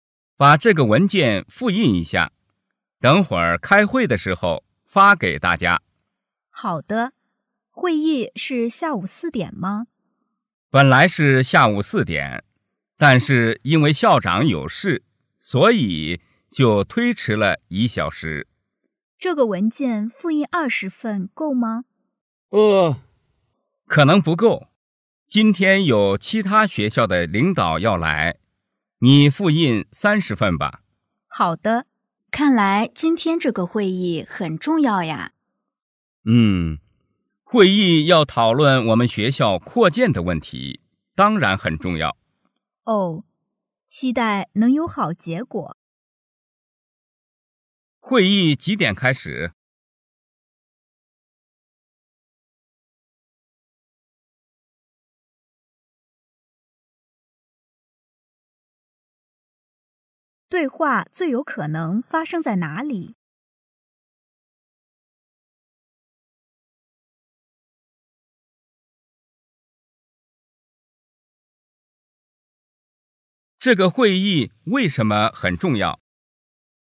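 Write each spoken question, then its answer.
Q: 会议几点开始?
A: 下午5点

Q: 这个会议为什么很重要?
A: 要讨论学校扩建的问题

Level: 汉语水平考试(MHK)三级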